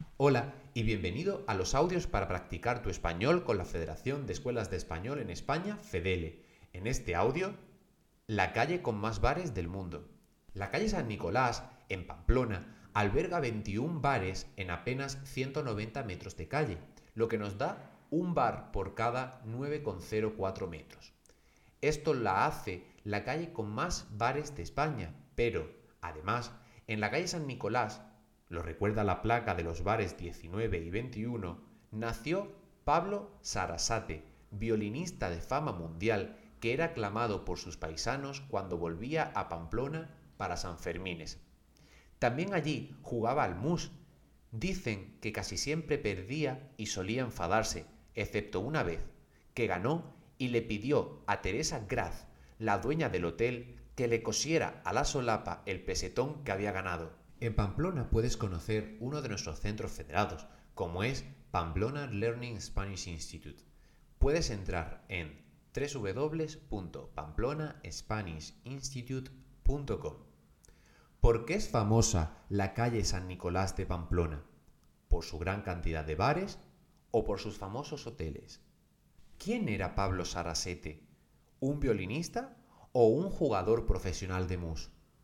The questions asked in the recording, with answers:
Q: ¿Por qué es famosa la calle San Nicolás de Pamplona?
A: Es famosa por su gran cantidad de bares.

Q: ¿Quién era Pablo Sarasete?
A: Y Pablo Sarasete era violinista.